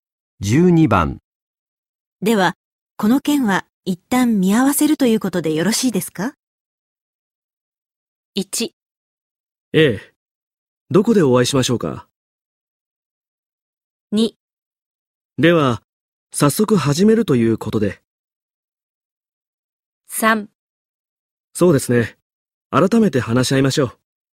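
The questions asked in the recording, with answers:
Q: では、この件は一旦見合わせるということでよろしいですか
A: 3: そうですね。改めて話し合いましょう。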